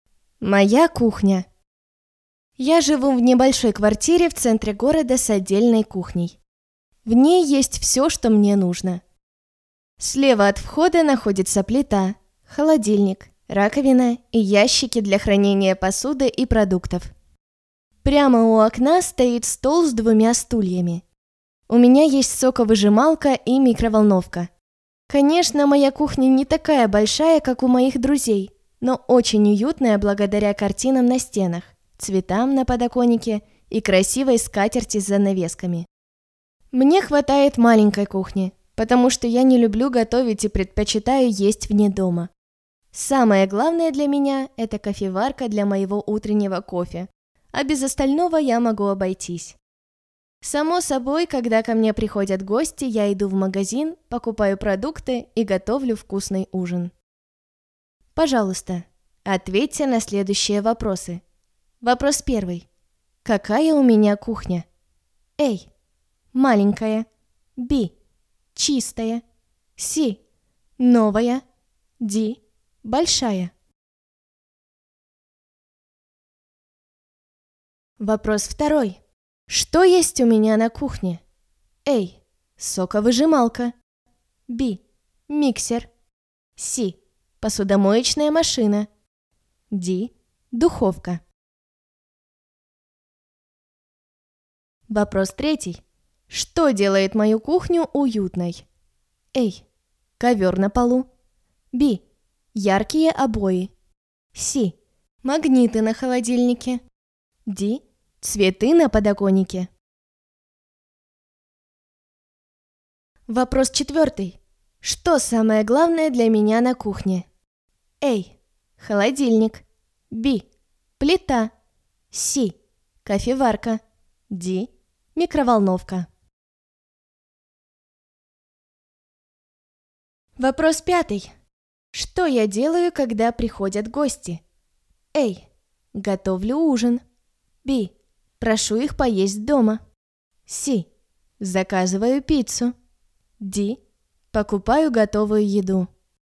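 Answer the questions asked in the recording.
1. A: Маленькая
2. A: Соковыжималка
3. D: Цветы на подоконнике
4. C: Кофеварка
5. A: Готовлю ужин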